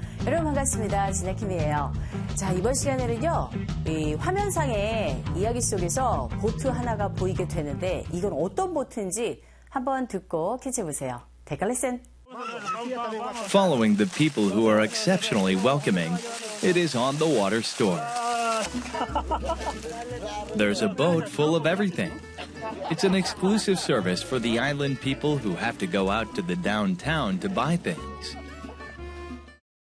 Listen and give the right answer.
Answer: 바로 이 배는요, 상점, 그 배 위에 매점처럼 되어 있는 그런 배입니다.